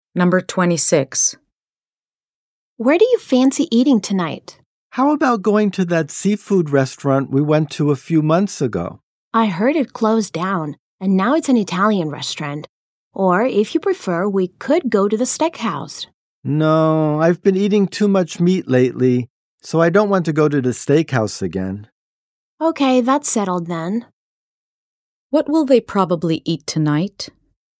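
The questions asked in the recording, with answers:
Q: What will they probably eat tonight?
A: Italian food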